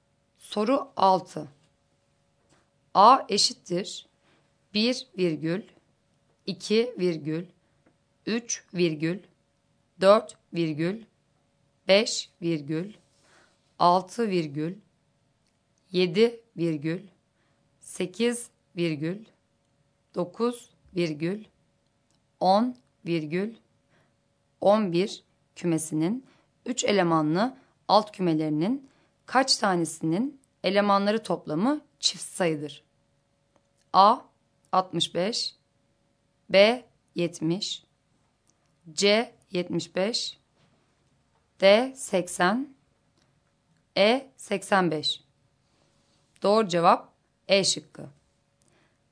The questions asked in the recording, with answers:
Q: A eşittir 1 virgül 2 virgül 3 virgül 4 virgül 5 virgül 6 virgül 7 virgül 8 virgül 9 virgül 10 virgül 11 kümesinin 3 elemanlı alt kümelerinin kaç tanesinin elemanları toplamı çift sayıdır?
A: Doğru cevap E şıkkı.